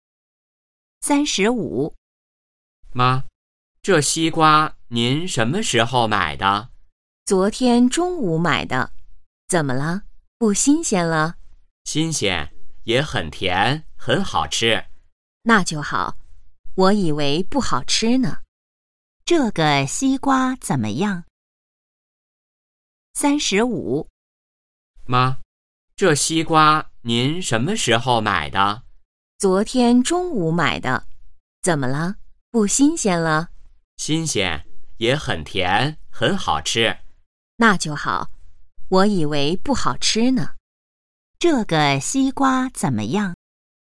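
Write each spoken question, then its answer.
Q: 这个西瓜怎么样?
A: 很新鲜,也很甜,很好吃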